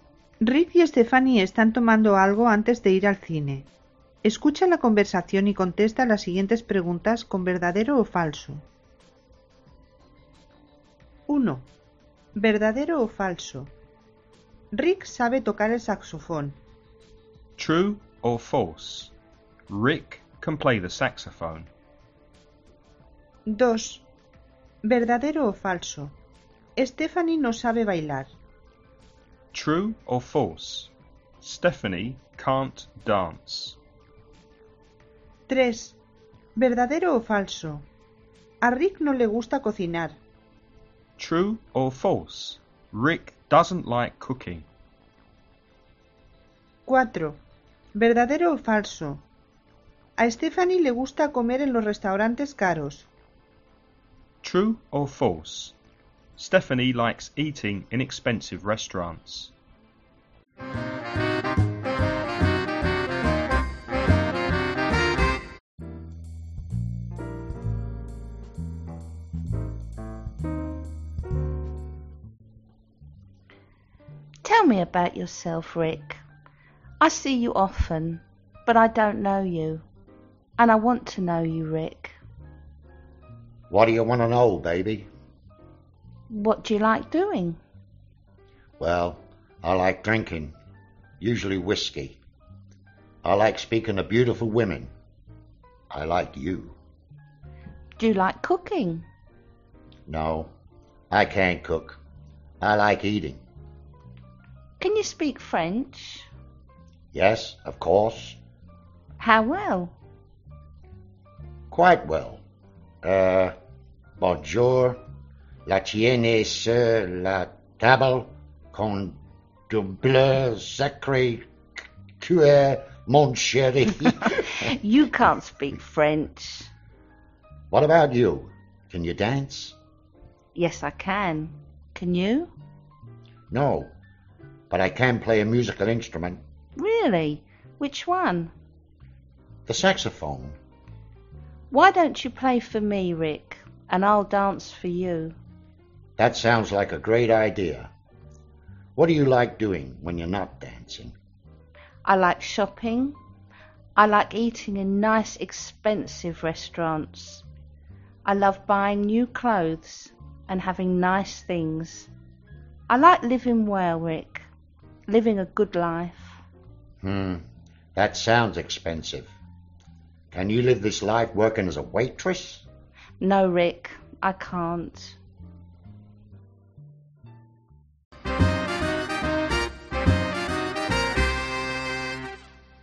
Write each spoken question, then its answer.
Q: True or false? Rick can play the saxophone.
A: Verdadero.

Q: True or false? Stephanie can't dance.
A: Falso.

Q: True or false? Rick doesn't like cooking.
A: Verdadero.

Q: True or false? Stephanie likes eating in expensive restaurants.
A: Verdadero.